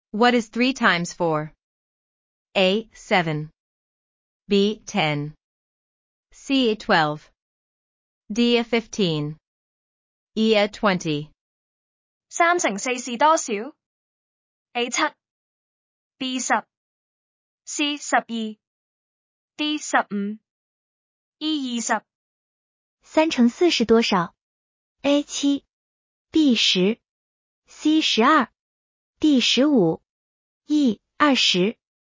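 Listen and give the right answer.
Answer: C: 12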